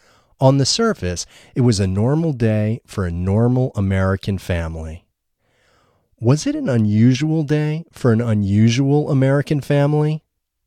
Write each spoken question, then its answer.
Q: Was it an unusual day for an unusual American family?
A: No, it wasn't an unusual day for an unusual American family.